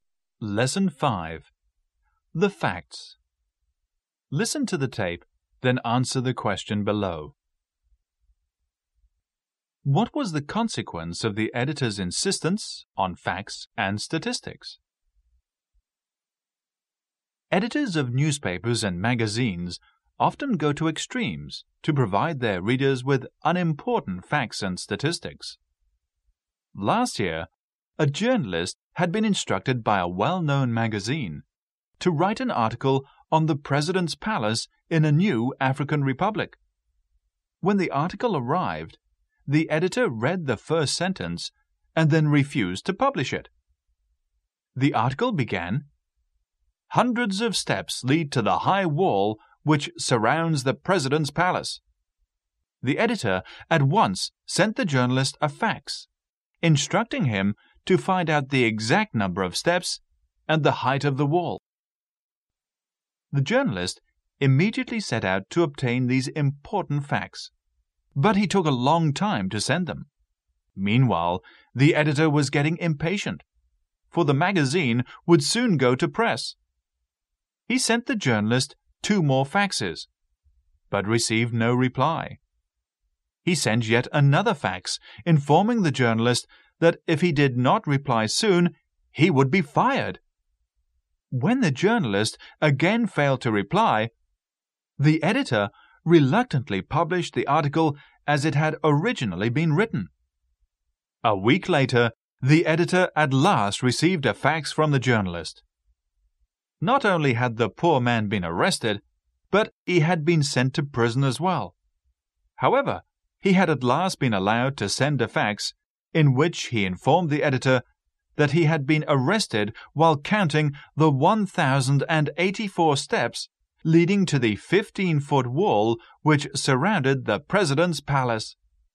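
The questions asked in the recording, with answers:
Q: What was the consequence of the editor's insistence on facts and statistics?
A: The journalist was arrested and sent to prison while counting the steps, and the article was published as originally written.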